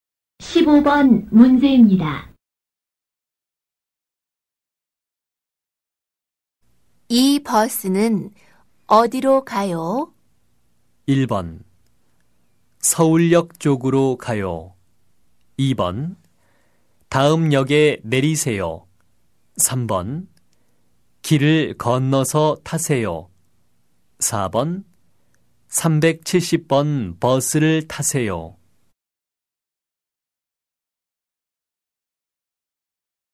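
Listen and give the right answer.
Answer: 1: 서울역 쪽으로 가요.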